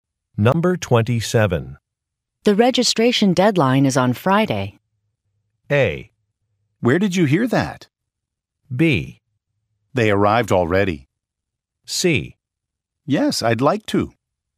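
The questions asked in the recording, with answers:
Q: The registration deadline is on Friday.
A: A: Where did you hear that?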